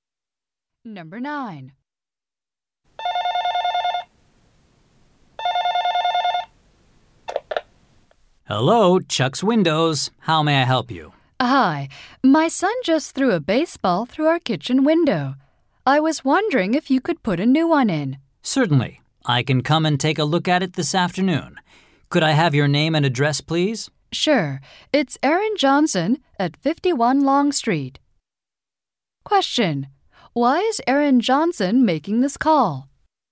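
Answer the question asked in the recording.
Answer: To get a broken kitchen window replaced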